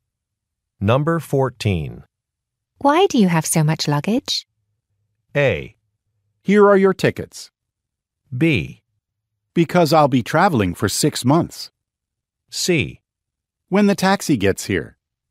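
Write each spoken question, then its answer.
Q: Why do you have so much luggage?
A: B: Because I'll be traveling for 6 months.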